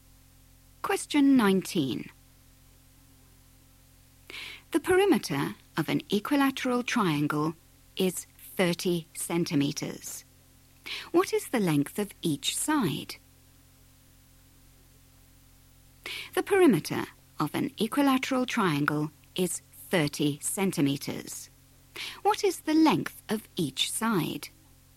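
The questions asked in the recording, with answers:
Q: What is the length of each side?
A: 10 centimetres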